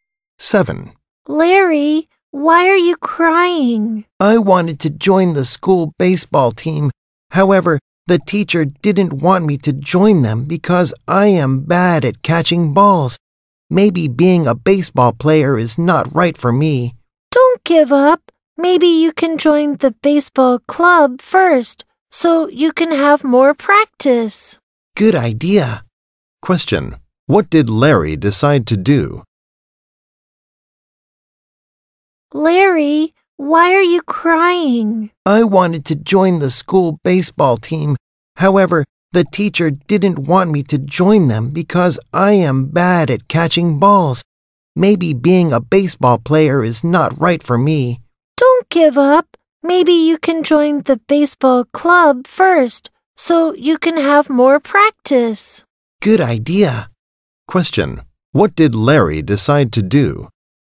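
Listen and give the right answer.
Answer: Join the baseball club first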